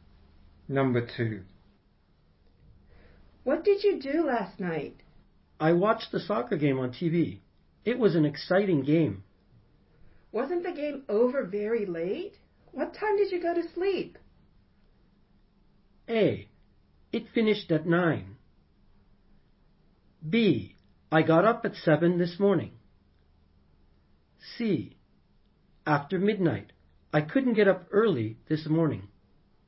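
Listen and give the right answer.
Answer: C: After midnight. I couldn't get up early this morning.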